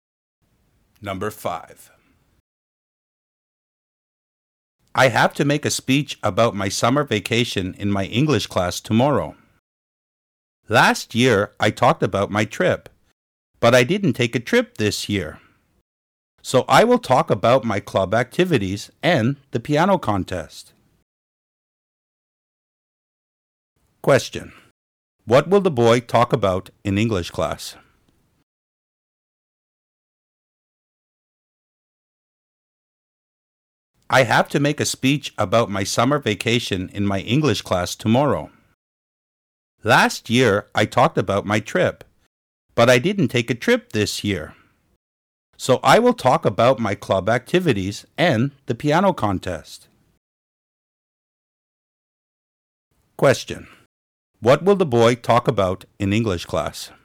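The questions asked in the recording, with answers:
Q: What will the boy talk about in English class?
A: His club activities and the piano contest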